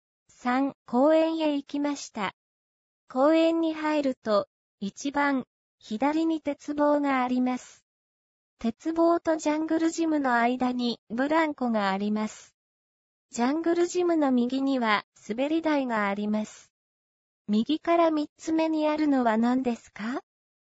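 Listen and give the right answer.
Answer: ブランコ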